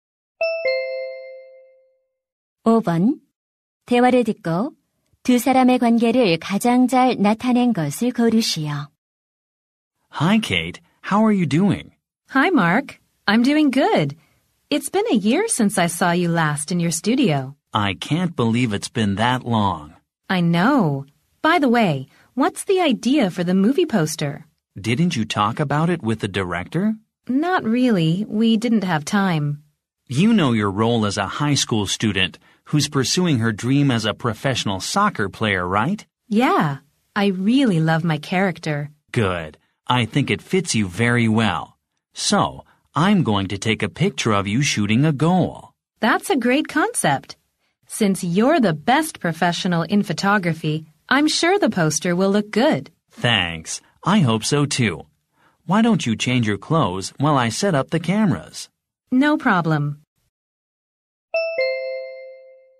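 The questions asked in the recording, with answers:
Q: 대화를 듣고 두 사람의 관계를 가장 잘 나타낸 것을 고르시오.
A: 사진작가 - 영화배우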